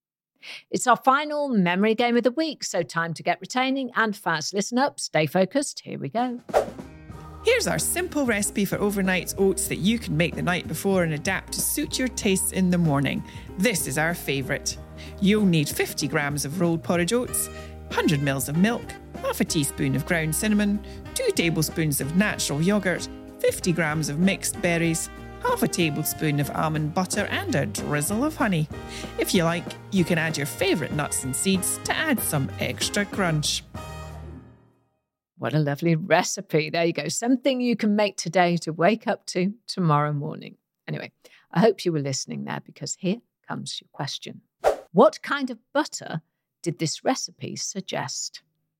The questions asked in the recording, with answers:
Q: What kind of butter did this recipe suggest?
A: The answer was almond butter.